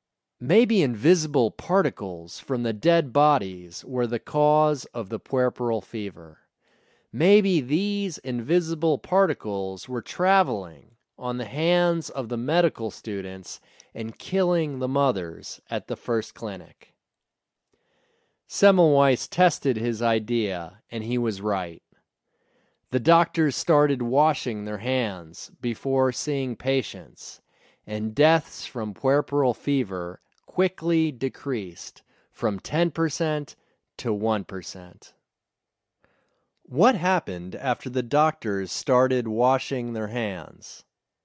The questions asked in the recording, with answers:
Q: What happened after the doctors started washing their hands?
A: After the doctors started washing their hands, deaths from puerperal fever quickly decreased from 10% to 1%.